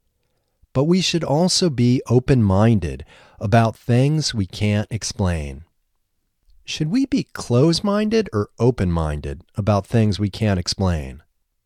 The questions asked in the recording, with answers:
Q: Should we be closed-minded or open-minded about things we can't explain?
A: We should be open-minded about things we can't explain.